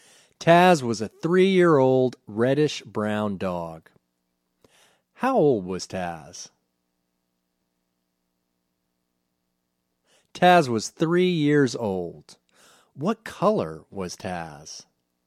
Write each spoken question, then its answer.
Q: What color was Taz?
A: Taz was a reddish-brown dog.